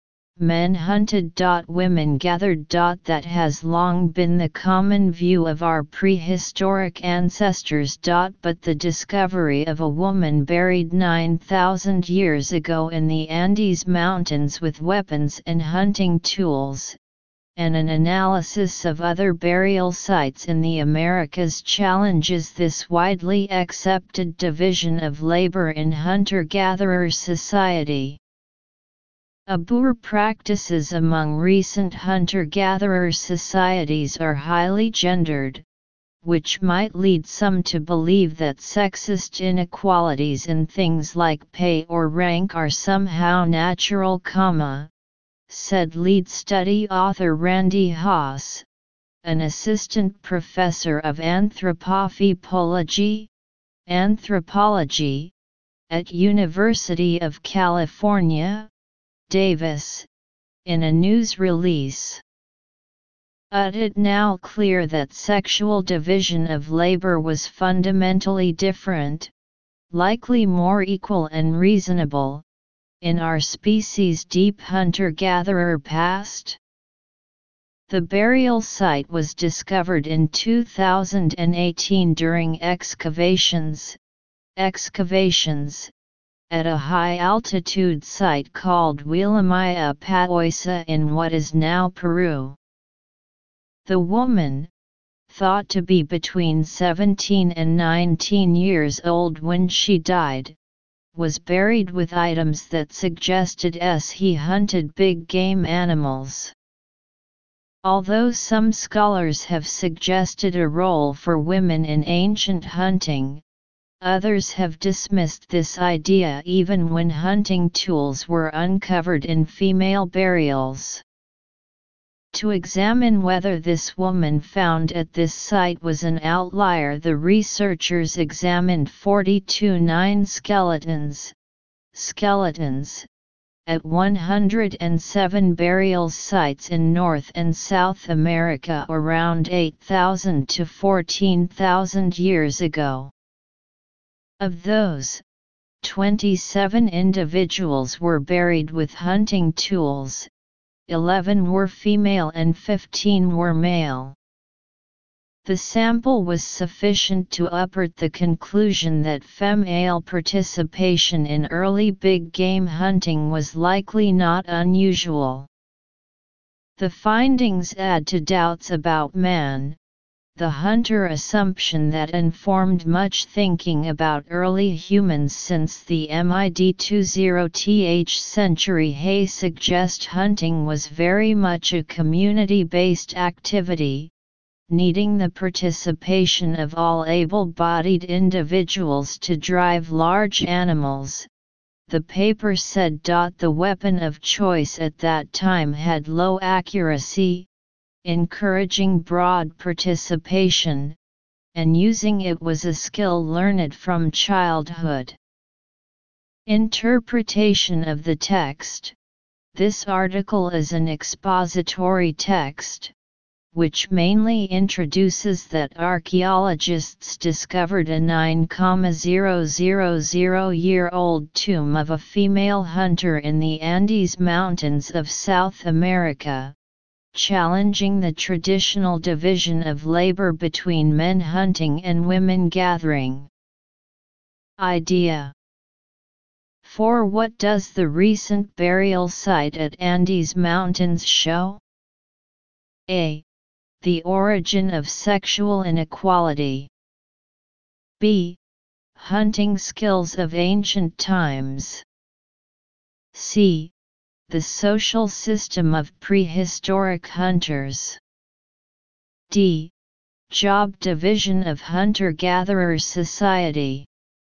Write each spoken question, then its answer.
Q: For what does the recent burial site at Andes Mountains show?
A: Choose D.